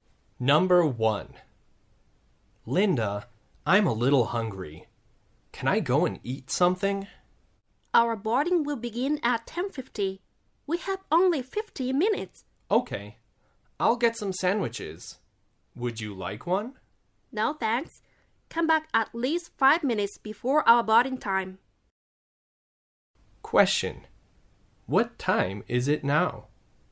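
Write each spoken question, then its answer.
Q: What time is it now?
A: 10:00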